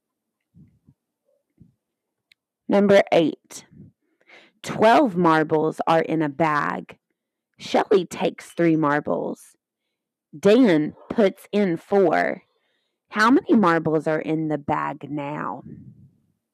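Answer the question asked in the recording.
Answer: 13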